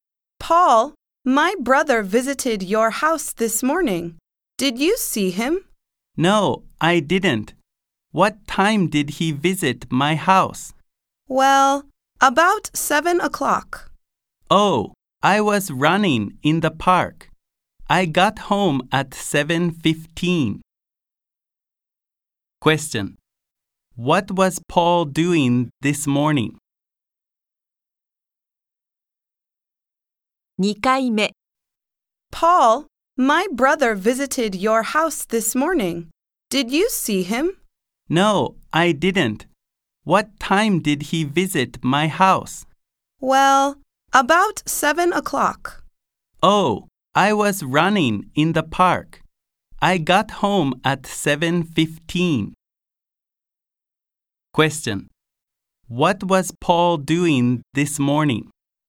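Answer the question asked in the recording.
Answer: He was running in the park.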